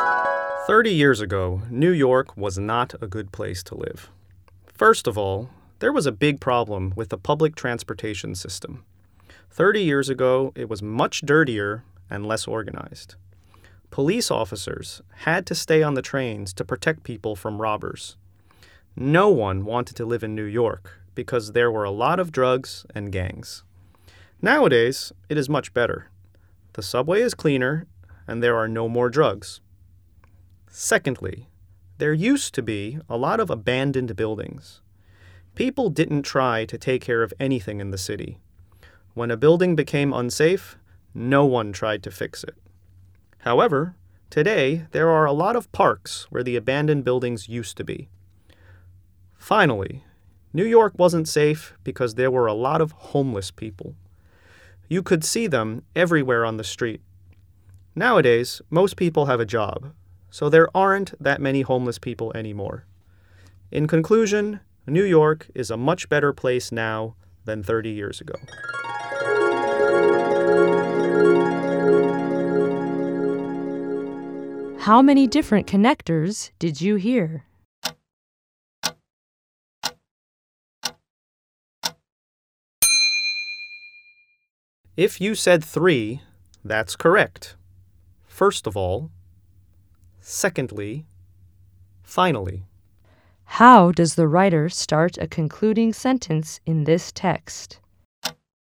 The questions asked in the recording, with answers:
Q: How does the writer start a concluding sentence in this text?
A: The correct answer is, in conclusion.